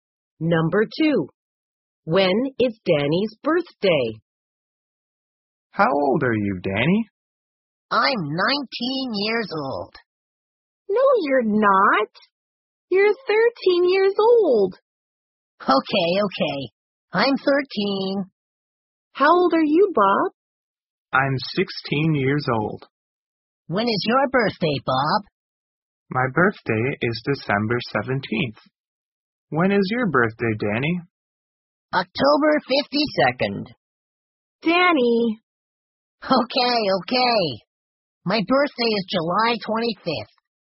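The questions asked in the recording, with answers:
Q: When is Danny's birthday?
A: July 25th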